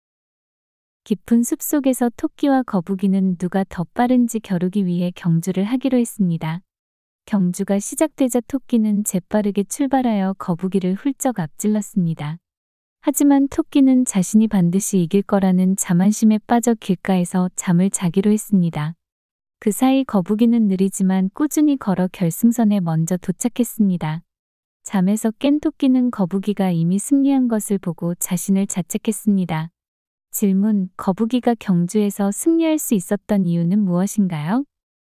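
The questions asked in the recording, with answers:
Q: 거북이가 경주에서 승리할 수 있었던 이유는 무엇인가요?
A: 토끼가 자만해서 잠을 자는 사이 거북이가 느리지만 꾸준히 걸었기 때문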